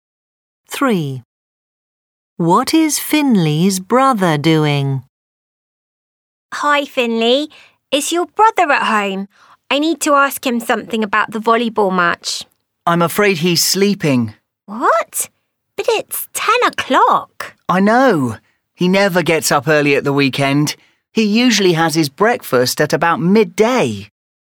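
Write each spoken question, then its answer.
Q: What is Finley's brother doing?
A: sleeping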